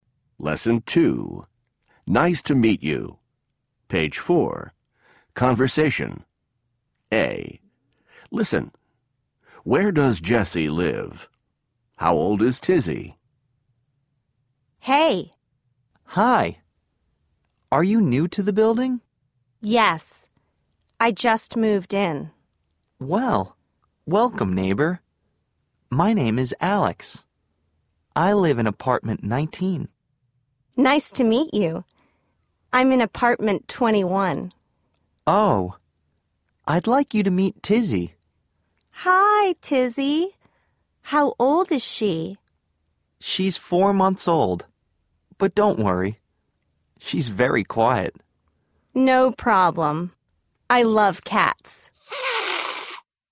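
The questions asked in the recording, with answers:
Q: How old is Tizzy?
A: 4 months old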